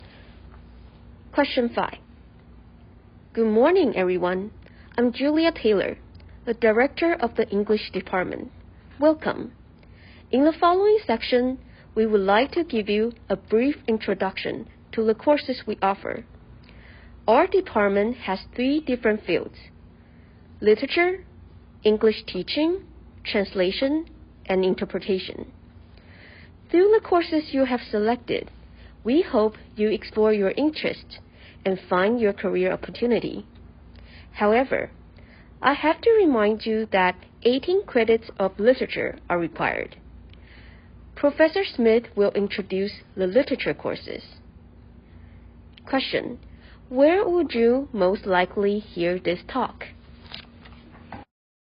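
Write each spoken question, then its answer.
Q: Where would you most likely hear this talk?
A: At an English department orientation for new students at a university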